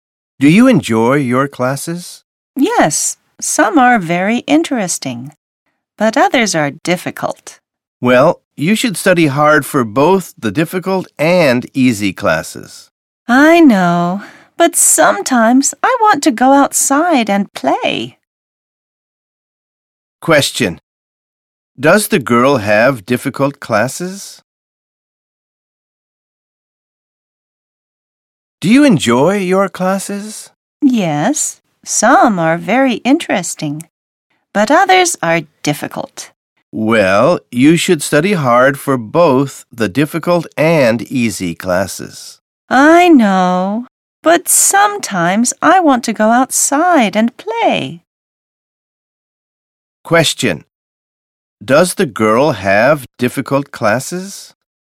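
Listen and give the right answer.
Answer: Yes, some of her classes are difficult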